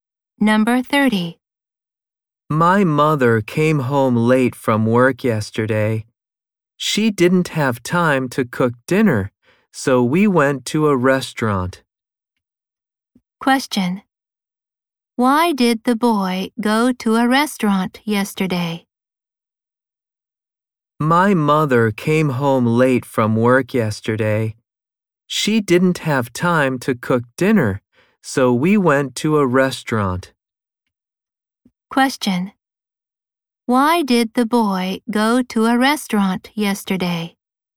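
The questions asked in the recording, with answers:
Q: Why did the boy go to a restaurant yesterday?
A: His mother didn't have time to cook dinner.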